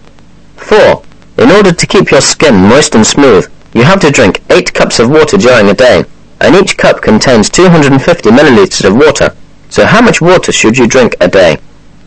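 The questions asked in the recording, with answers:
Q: So how much water should you drink a day?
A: 2,000 milliliters (2 liters)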